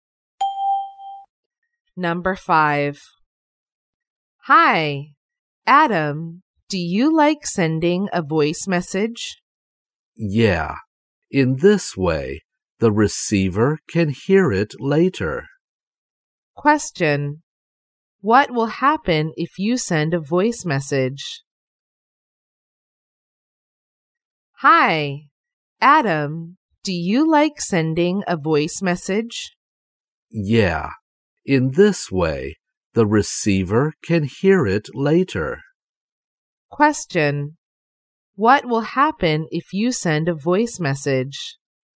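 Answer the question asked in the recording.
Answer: The receiver can hear it later.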